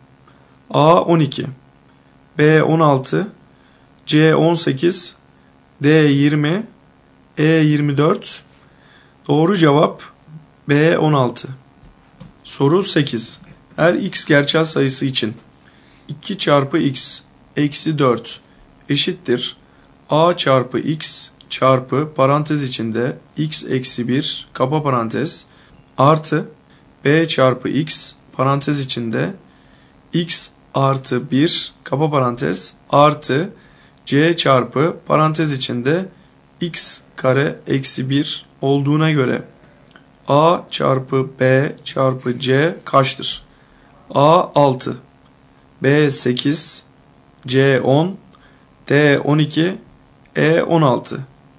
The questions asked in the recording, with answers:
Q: Her x gerçel sayısı için 2 çarpı x eksi 4 eşittir a çarpı x çarpı parantez içinde x eksi 1 kapa parantez artı b çarpı x parantez içinde x artı 1 kapa parantez artı c çarpı parantez içinde x kare eksi 1 olduğuna göre a çarpı b çarpı c kaçtır?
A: Doğru cevap D 12.